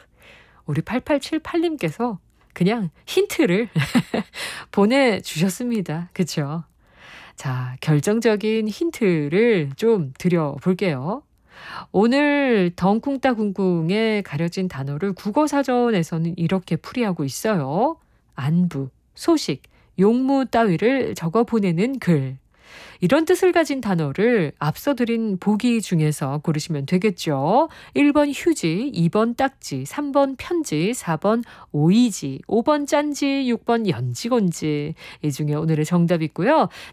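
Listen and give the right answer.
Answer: 3: 편지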